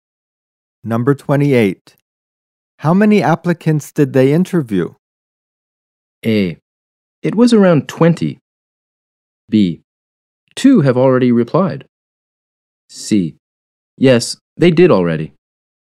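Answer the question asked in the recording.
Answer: A: It was around 20.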